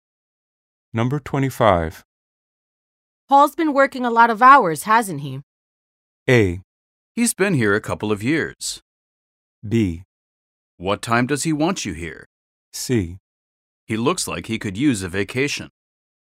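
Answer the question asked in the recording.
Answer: C: He looks like he could use a vacation.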